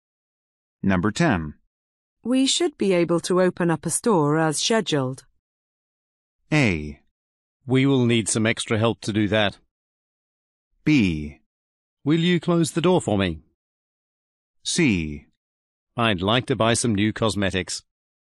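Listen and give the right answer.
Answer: A: We will need some extra help to do that.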